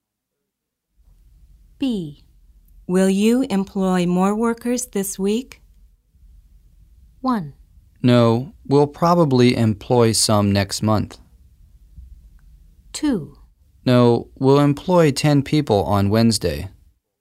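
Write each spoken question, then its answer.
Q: Will you employ more workers this week?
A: 1: No, we'll probably employ some next month.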